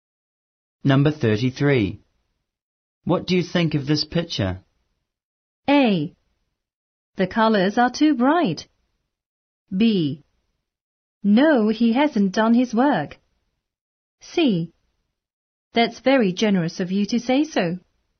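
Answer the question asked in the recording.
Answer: A: The colors are too bright.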